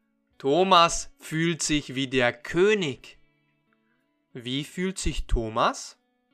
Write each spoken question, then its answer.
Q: Wie fühlt sich Thomas?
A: wie der König. Er fühlt sich wie der König.